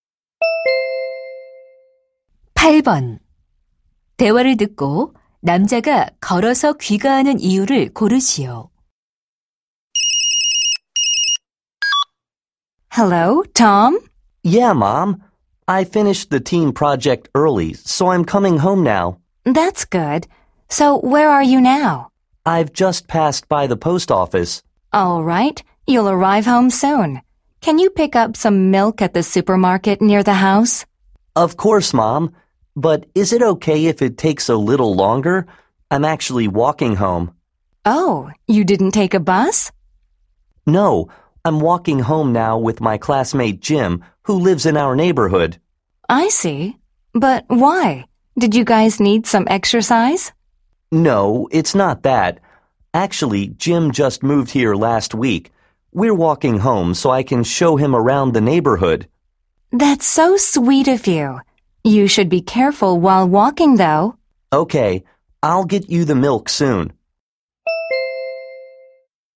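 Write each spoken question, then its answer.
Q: 대화를 듣고 남자가 걸어서 귀가하는 이유를 고르시오.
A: 이사 온 친구에게 동네를 구경시켜 주려고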